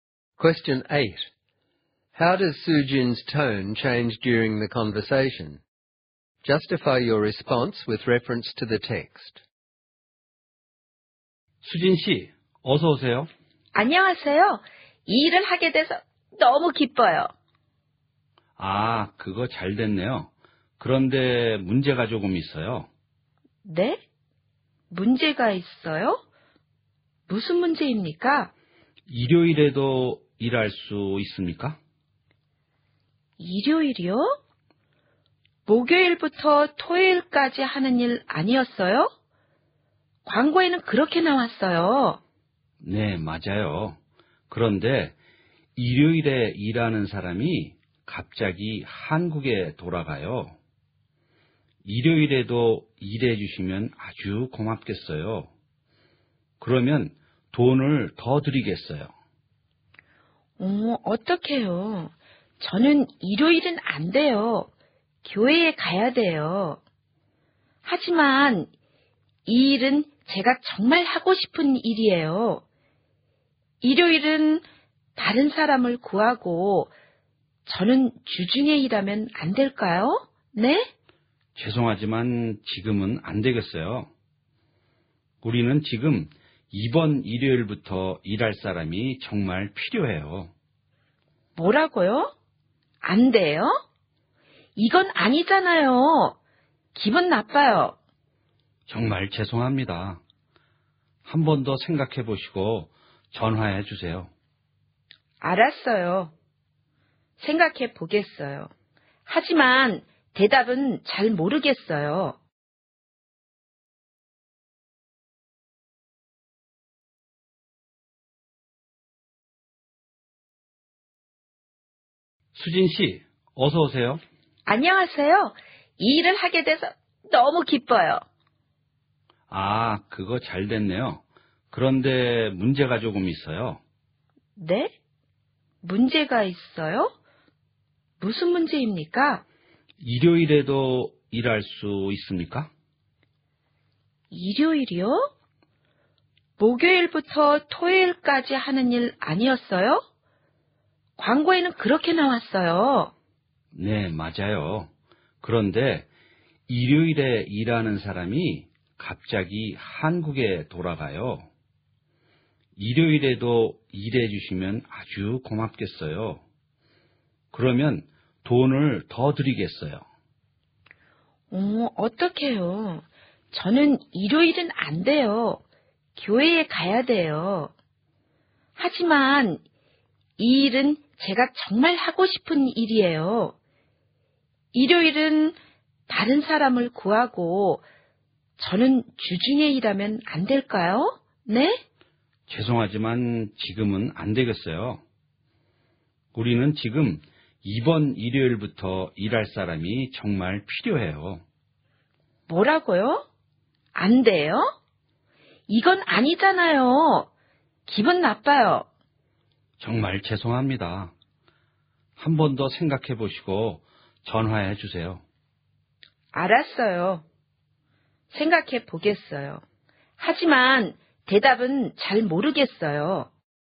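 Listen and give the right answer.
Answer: She starts happy and excited about the job, becomes surprised and worried when asked to work Sundays, pleads for weekdays, then becomes upset and annoyed when refused.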